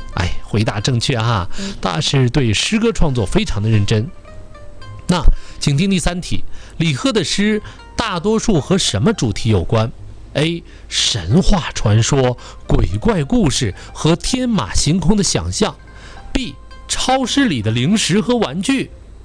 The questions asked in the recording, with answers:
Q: 李贺的诗大多数和什么主题有关?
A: 选择 A 回答正确哈。